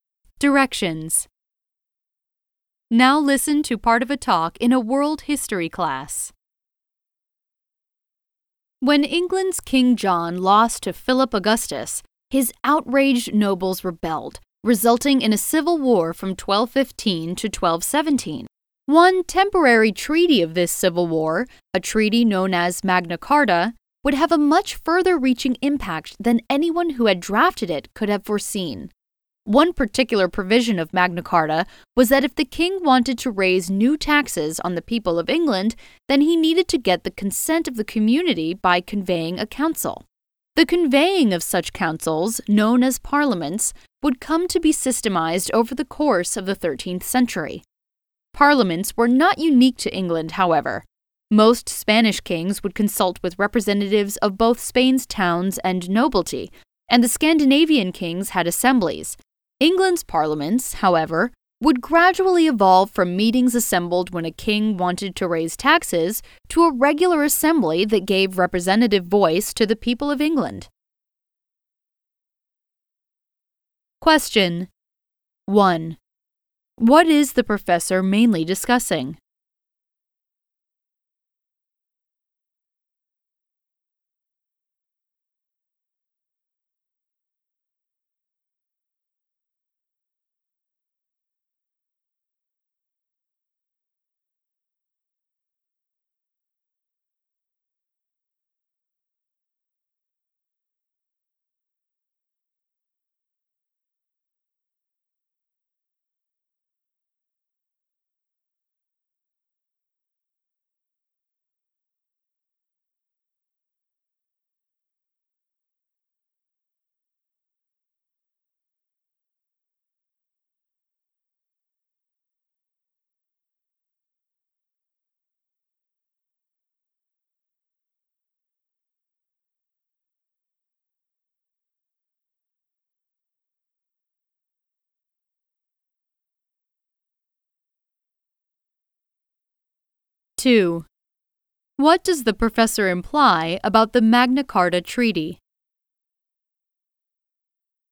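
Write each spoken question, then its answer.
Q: What is the professor mainly discussing?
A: How Magna Carta led to the development of England's parliaments

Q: What does the professor imply about the Magna Carta Treaty?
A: Its impact went much further than its drafters expected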